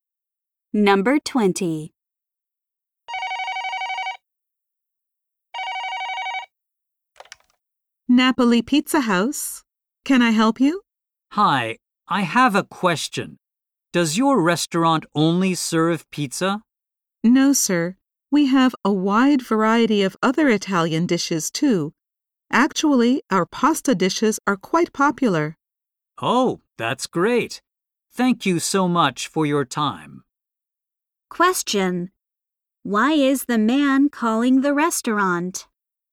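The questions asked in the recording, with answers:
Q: Why is the man calling the restaurant?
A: To ask whether the restaurant serves only pizza.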